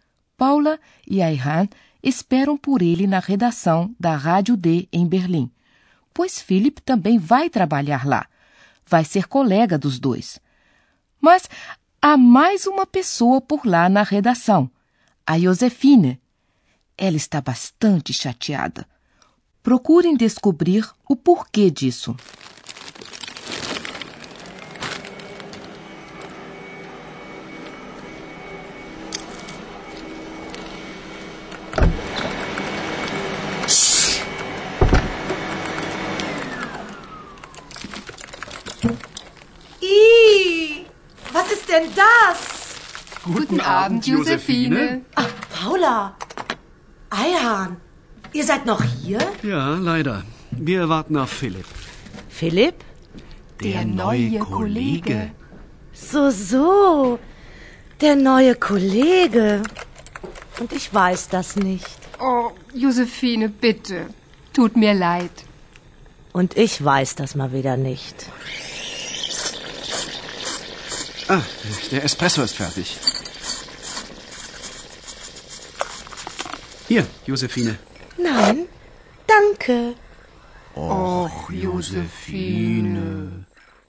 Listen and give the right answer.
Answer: Como Josefine tem amizade com Paula e Ayhan, ficou chateada e com razão por não saber de nada.